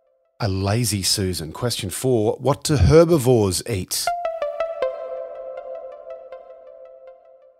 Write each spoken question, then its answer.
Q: What do herbivores eat?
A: Plants.